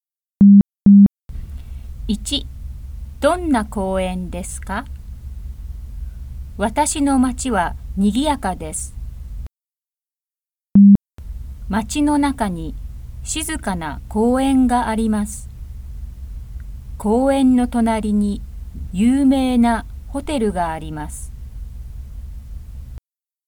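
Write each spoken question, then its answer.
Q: どんな公園ですか?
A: 静かな公園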